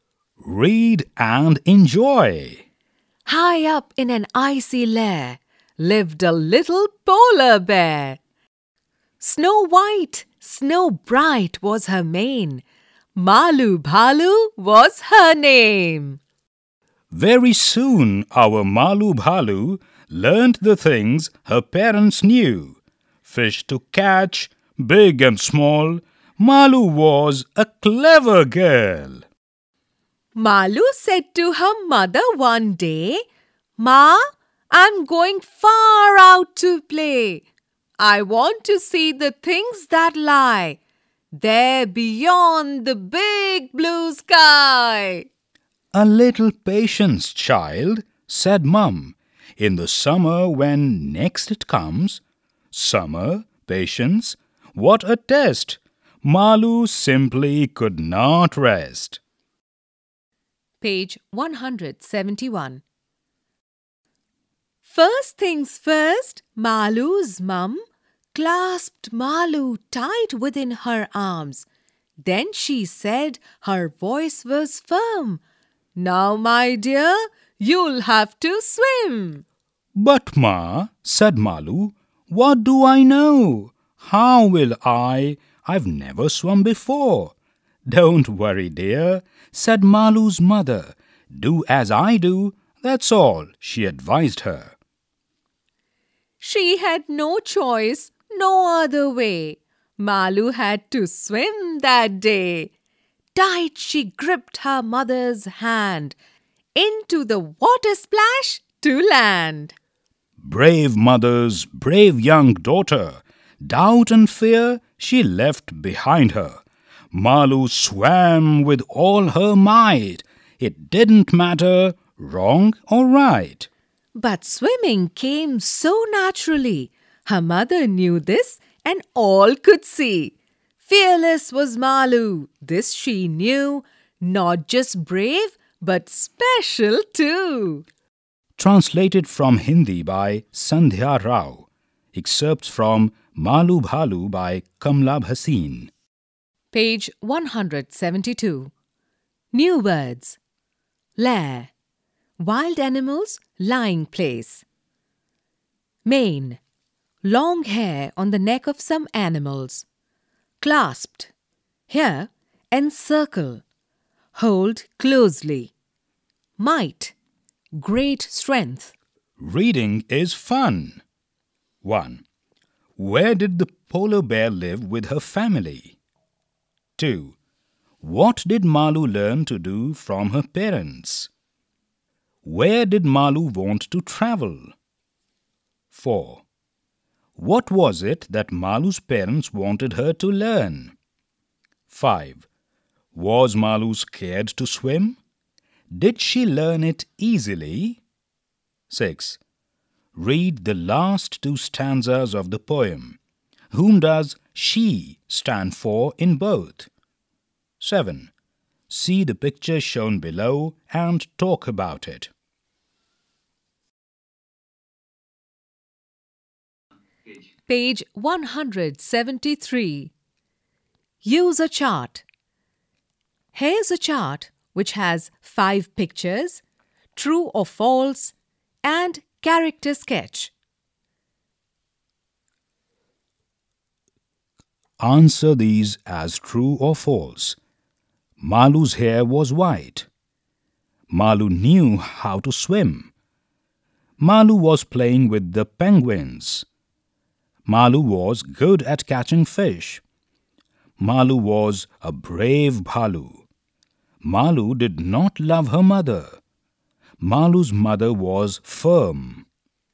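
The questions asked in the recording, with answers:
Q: Where did the polar bear live with her family?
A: High up in an icy lair

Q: What did Malu learn to do from her parents?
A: To catch fish, big and small

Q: Where did Malu want to travel?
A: Far out, beyond the big blue sky

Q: What was it that Malu's parents wanted her to learn?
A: To swim

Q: Was Malu scared to swim?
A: No, she left doubt and fear behind

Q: Did she learn it easily?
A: Yes, swimming came naturally to her

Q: Malu's hair was white.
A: True

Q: Malu was good at catching fish.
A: True

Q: Malu was a brave Bhalu.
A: True

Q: Malu's mother was firm.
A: True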